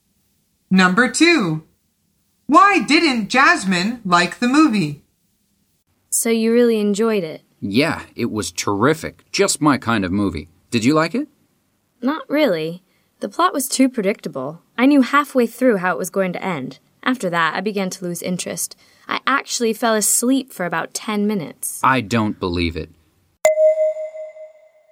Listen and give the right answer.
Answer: The answer is because it was too predictable.